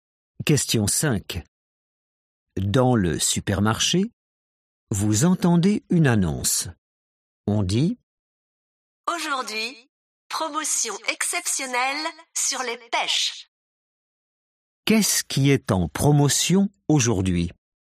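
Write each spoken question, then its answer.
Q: Qu'est-ce qui est en promotion aujourd'hui?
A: les pêches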